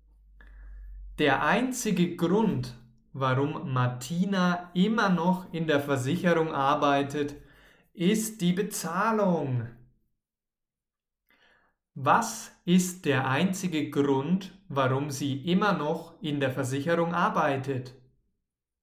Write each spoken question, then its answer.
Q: Was ist der einzige Grund, warum sie immer noch in der Versicherung arbeitet?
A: Die Bezahlung. Ja, der einzige Grund, warum sie immer noch dort arbeitet, ist die Bezahlung.